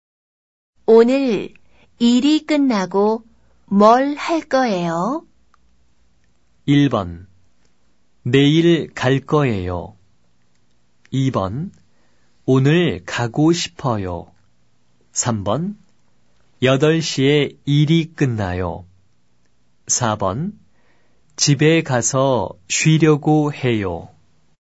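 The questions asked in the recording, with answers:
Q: 오늘 일이 끝나고 뭘 할 거예요?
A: 4: 집에 가서 쉬려고 해요.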